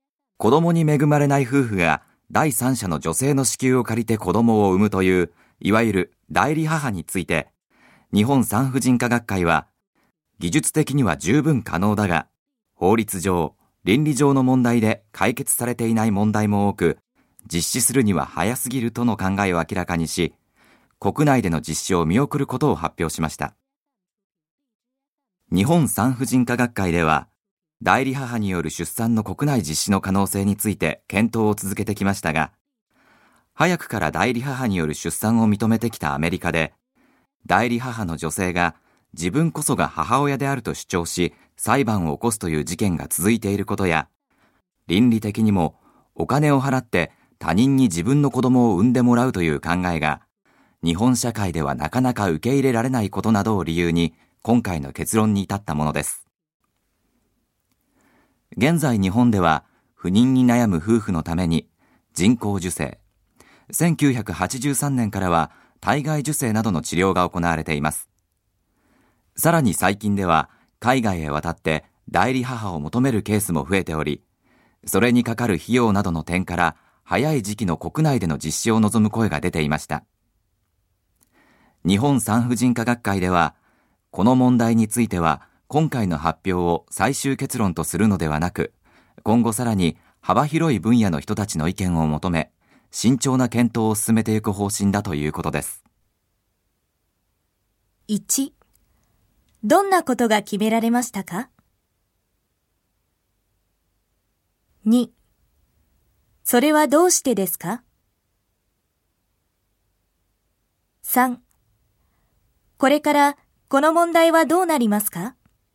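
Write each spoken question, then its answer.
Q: どんなことが決められましたか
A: 代理母による出産の国内での実施を見送ること

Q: それはどうしてですか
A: 法律上・倫理上の問題が解決されていないため(アメリカで代理母が母親だと主張する裁判が続いていることや、お金を払って他人に子供を産んでもらう考えが日本社会で受け入れられにくいこと)

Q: これからこの問題はどうなりますか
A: 最終結論とせず、幅広い分野の人の意見を求めて慎重に検討を続ける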